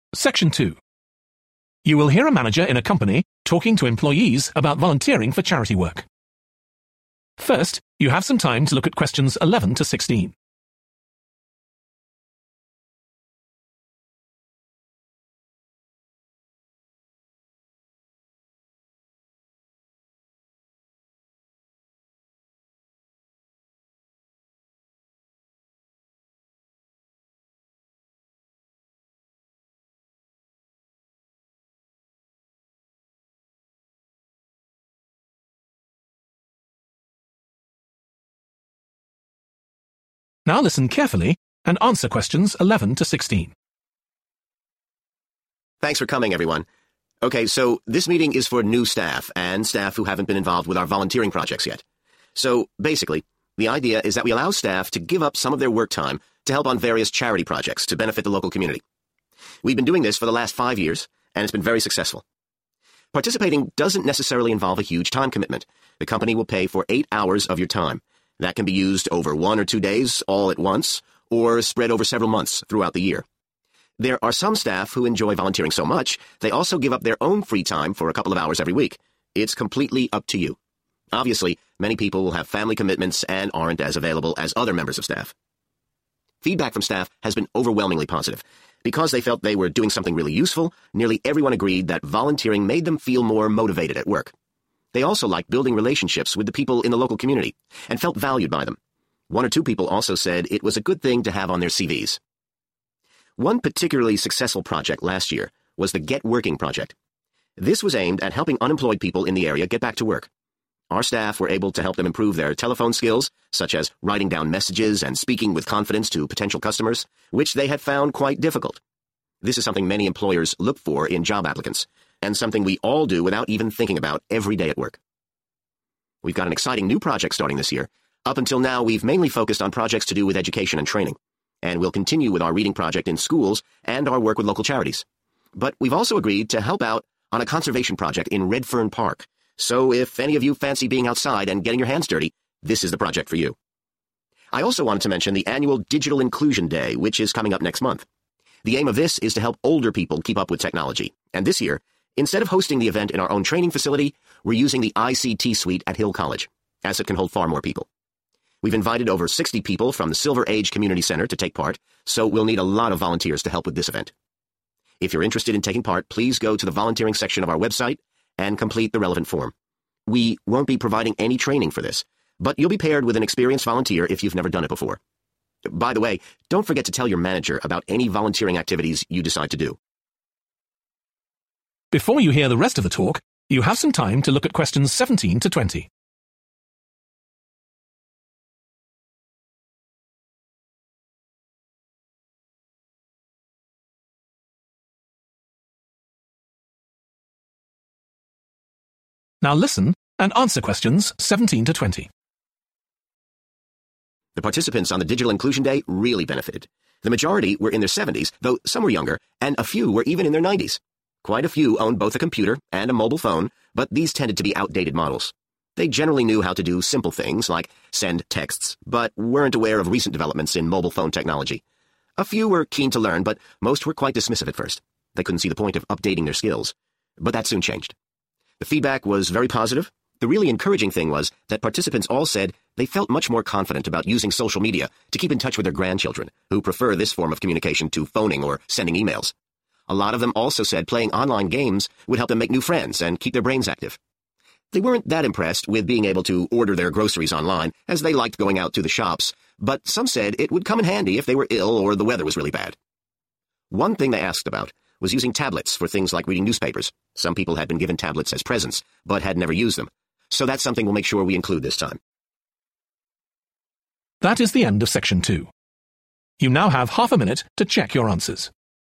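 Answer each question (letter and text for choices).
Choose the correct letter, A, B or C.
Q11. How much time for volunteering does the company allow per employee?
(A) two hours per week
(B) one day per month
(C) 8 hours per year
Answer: (C) 8 hours per year

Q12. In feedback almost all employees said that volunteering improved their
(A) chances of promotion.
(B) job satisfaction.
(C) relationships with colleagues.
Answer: (B) job satisfaction.

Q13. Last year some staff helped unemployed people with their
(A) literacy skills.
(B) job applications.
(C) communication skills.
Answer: (C) communication skills.

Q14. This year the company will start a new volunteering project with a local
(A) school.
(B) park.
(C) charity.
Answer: (B) park.

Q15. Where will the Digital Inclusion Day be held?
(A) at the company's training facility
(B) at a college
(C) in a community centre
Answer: (B) at a college

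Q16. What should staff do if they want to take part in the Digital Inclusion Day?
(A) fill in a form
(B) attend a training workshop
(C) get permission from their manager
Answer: (A) fill in a form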